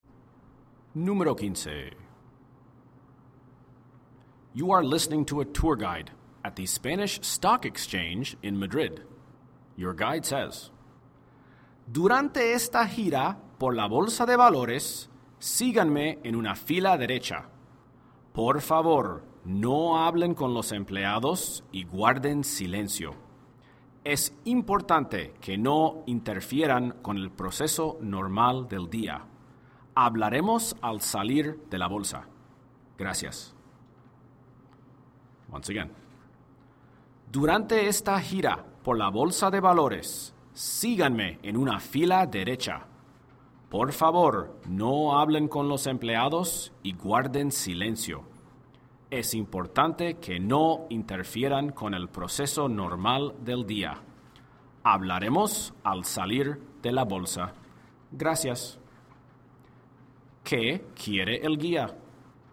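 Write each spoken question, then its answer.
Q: ¿Qué quiere el guía?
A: Que lo sigan en fila, guarden silencio y no hablen con los empleados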